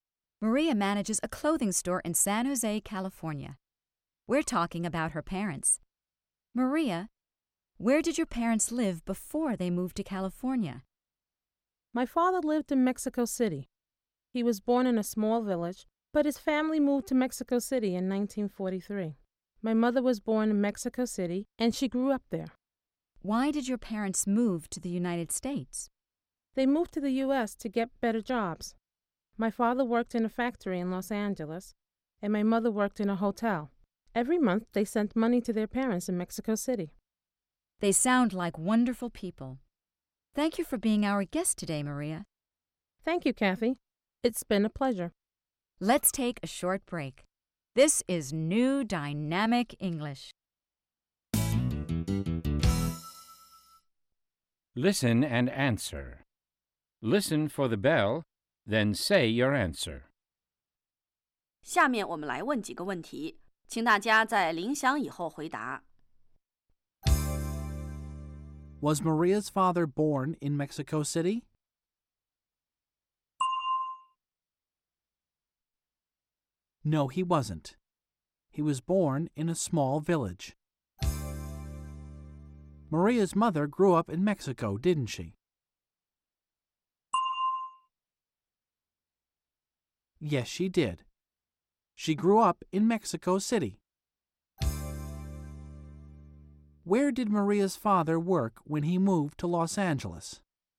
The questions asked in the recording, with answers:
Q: Was Maria's father born in Mexico City?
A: No, he wasn't. He was born in a small village.

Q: Where did Maria's father work when he moved to Los Angeles?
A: He worked in a factory.